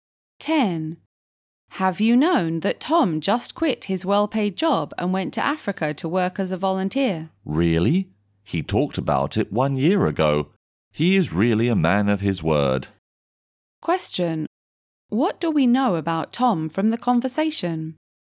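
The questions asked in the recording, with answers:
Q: What do we know about Tom from the conversation?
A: He keeps his word: he quit his well-paid job to volunteer in Africa, as he had said he would.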